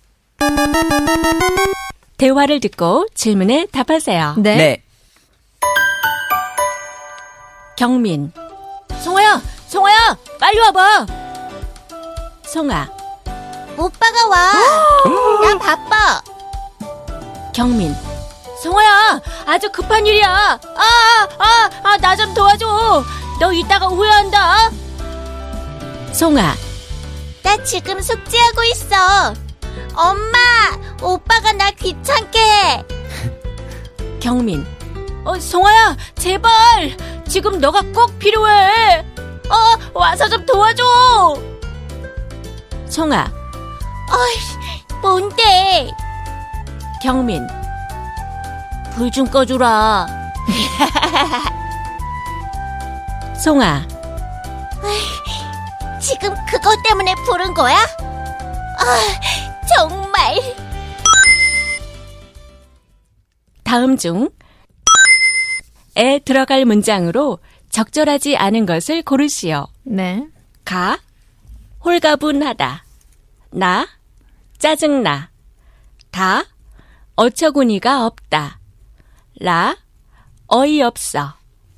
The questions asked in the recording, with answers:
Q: 다음 중에 들어갈 문장으로 적절하지 않은 것을 고르시오.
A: So the wrong and thus the right answer is 가 홀가분히하다, which means I feel relieved or I feel free and easy.